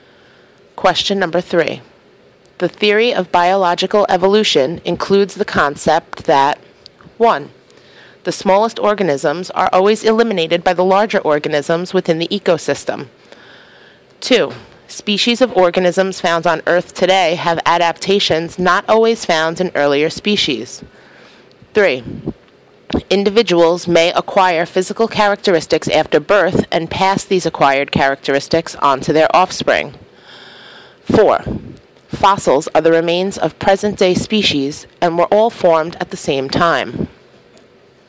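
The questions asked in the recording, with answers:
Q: The theory of biological evolution includes the concept that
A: 2: Species of organisms found on Earth today have adaptations not always found in earlier species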